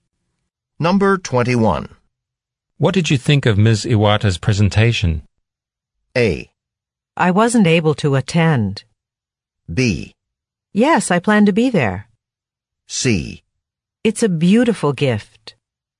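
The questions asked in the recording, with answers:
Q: What did you think of Ms. Iwata's presentation?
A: A: I wasn't able to attend.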